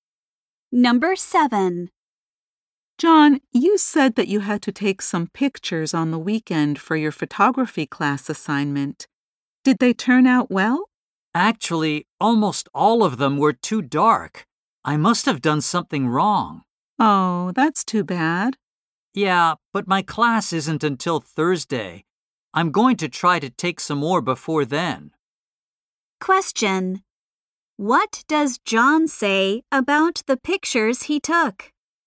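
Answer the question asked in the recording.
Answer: Almost all of them were too dark.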